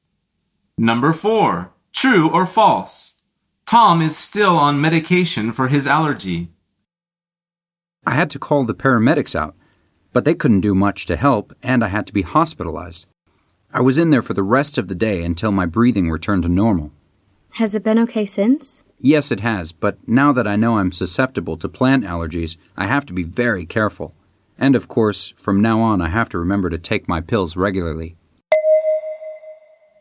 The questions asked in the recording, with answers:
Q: True or false? Tom is still on medication for his allergy.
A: The answer is true.